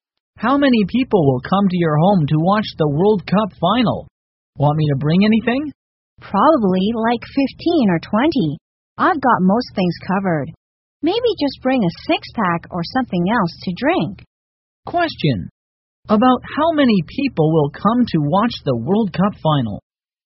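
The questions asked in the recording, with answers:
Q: About how many people will come to watch the World Cup final?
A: 15 or 20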